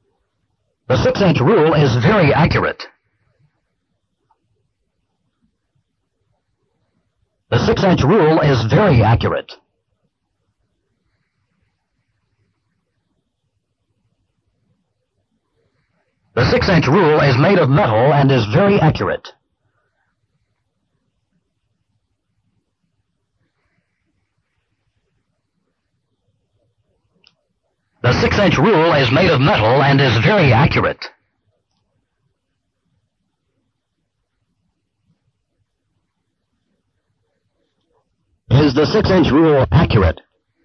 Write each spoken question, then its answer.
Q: Is the 6-inch rule accurate?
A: Yes, the 6-inch rule is accurate.